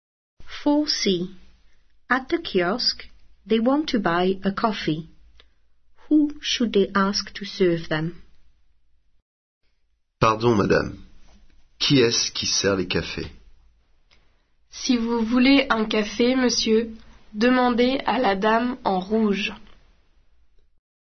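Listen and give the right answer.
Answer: the lady in red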